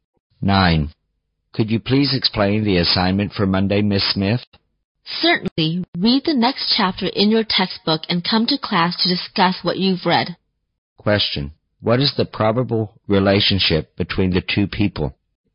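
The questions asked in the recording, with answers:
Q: what is the probable relationship between the two people?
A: Teacher and student.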